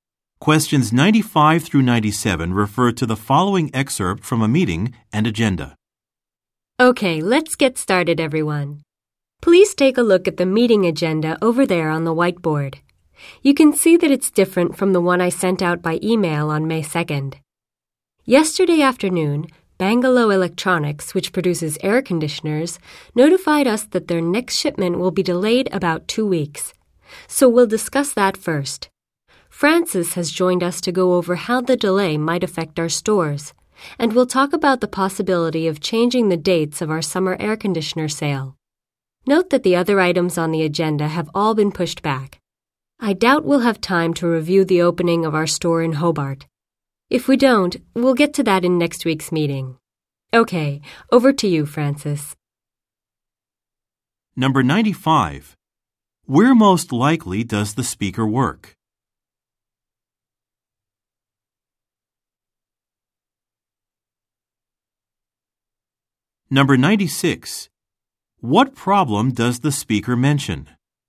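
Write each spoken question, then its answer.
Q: Where most likely does the speaker work?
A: At an electronics retailer

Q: What problem does the speaker mention?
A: A shipment of air conditioners will be delayed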